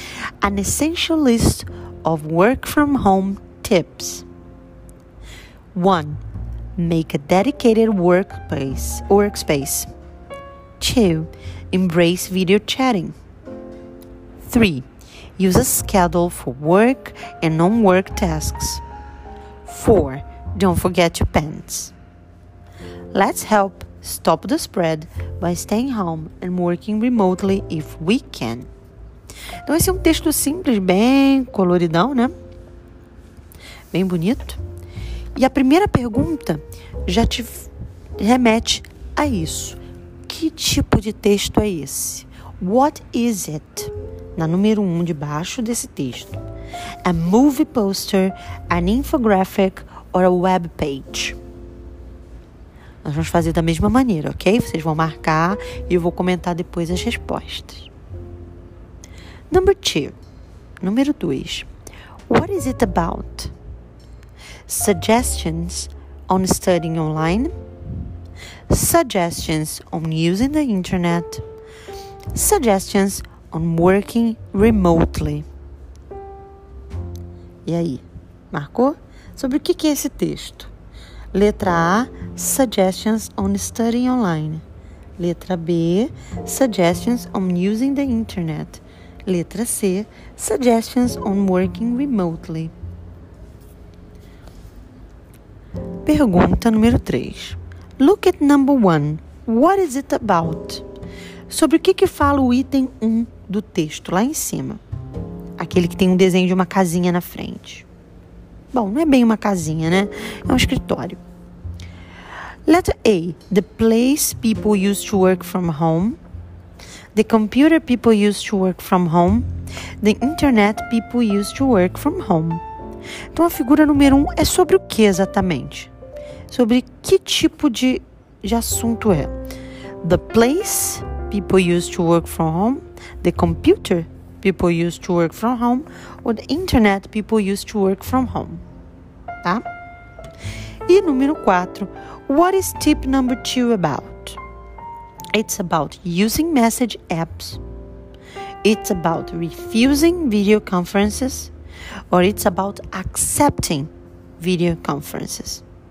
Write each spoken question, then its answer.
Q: What is it about?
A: A resposta da número 2 é a letra C.

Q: Look at number 1. What is it about?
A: Então, a resposta correta é a letra A: The place people used to work from home.

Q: what is tip number 2 about?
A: Então, a resposta da número 4 é a letra C.